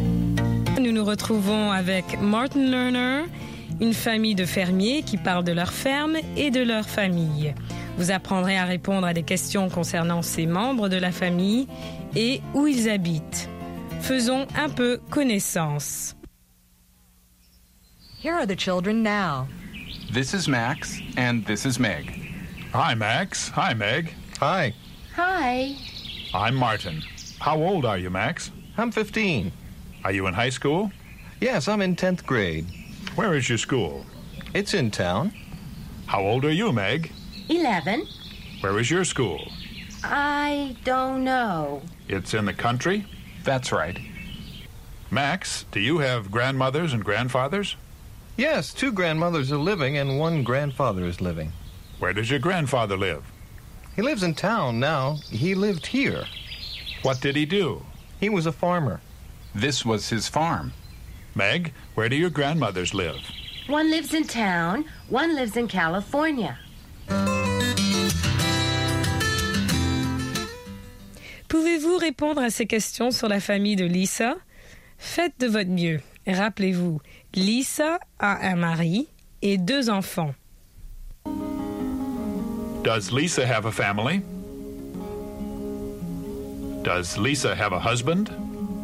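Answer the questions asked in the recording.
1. Yes, she does.
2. Yes, she does.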